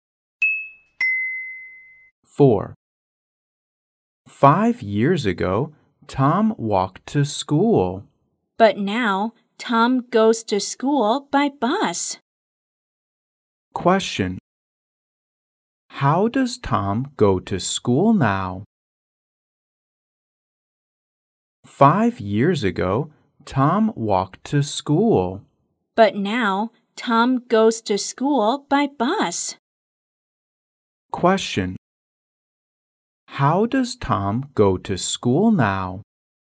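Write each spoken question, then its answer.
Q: Question. How does Tom go to school now?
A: By bus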